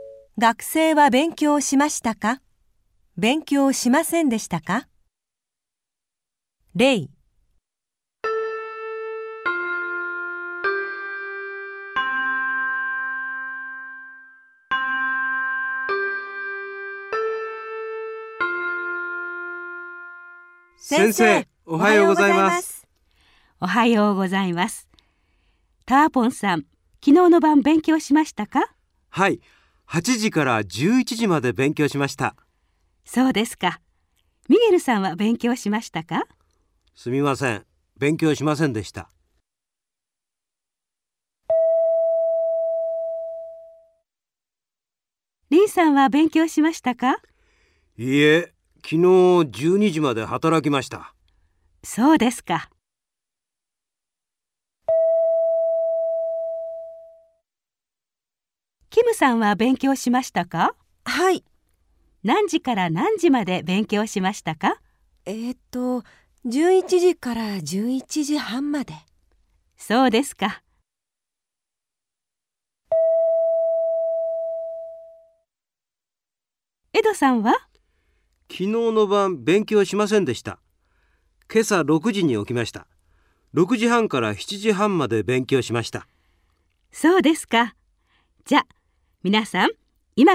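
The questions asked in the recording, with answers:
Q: 学生は勉強しましたか?勉強しませんでしたか?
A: ミゲルさん:勉強しませんでした

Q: 学生は勉強しましたか?勉強しませんでしたか?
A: リンさん:勉強しませんでした

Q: 学生は勉強しましたか?勉強しませんでしたか?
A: キムさん:勉強しました(11時から11時半まで)

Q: 学生は勉強しましたか?勉強しませんでしたか?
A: エドさん:勉強しました(今朝6時半から7時半まで)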